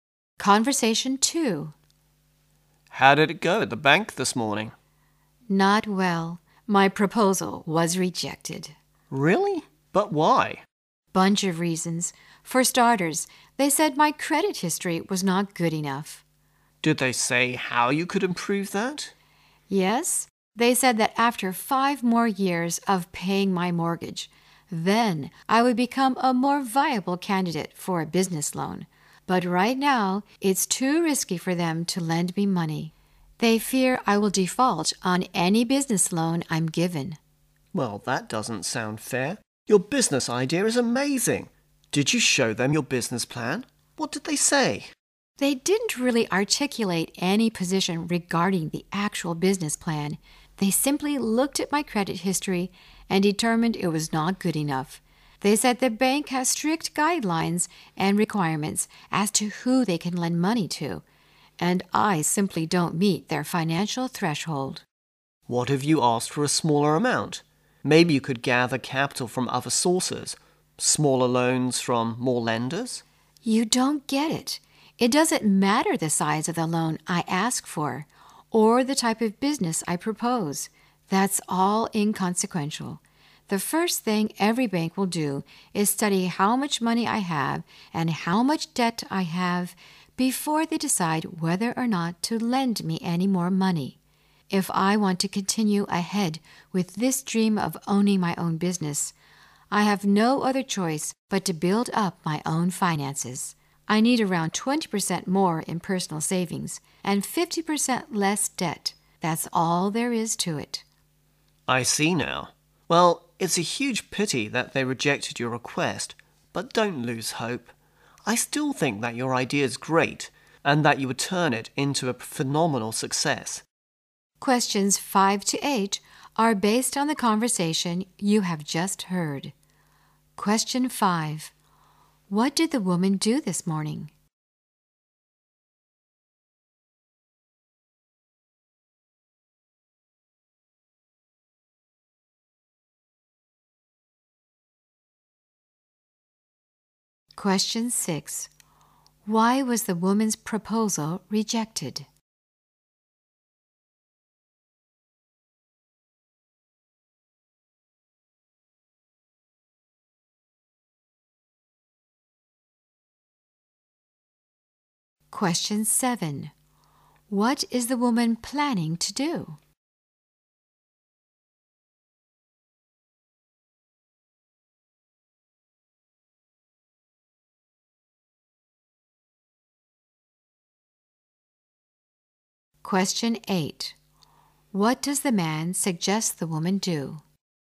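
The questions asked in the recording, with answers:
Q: What did the woman do this morning?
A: She went to the bank to apply for a business loan.

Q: Why was the woman's proposal rejected?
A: Her credit history was not good enough.

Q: What is the woman planning to do?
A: Build up her own finances: save more and cut her debt.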